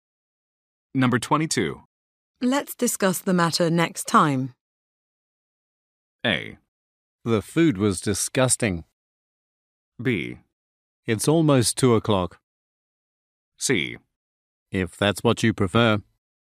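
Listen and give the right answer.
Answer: C: If that's what you prefer.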